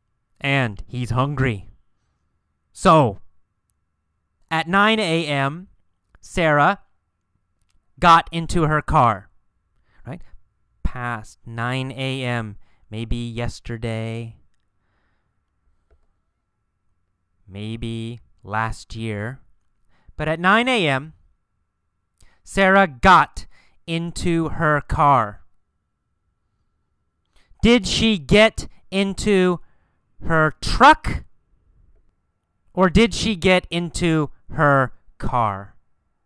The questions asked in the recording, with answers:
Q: Or did she get into her car?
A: Well, she got into her car.